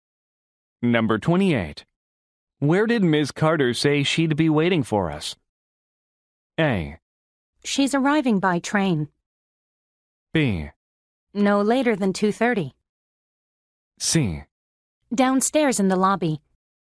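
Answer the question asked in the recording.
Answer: C: Downstairs in the lobby.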